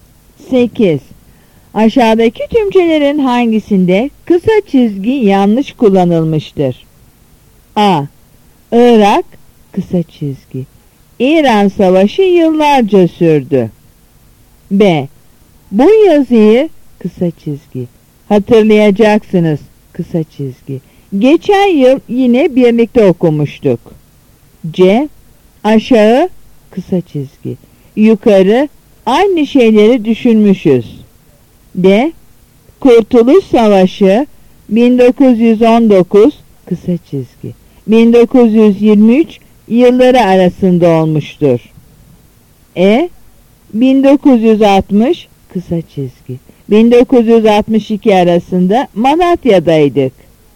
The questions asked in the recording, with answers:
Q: Aşağıdaki tümçelerin hangisinde kısa çizgi yanlış kullanılmıştır?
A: Yanıt C.